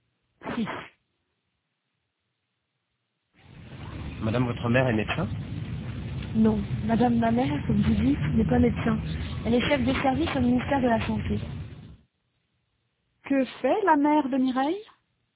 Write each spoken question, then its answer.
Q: Que fait la mère de Mireille?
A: Elle est chef de service au ministère de la Santé.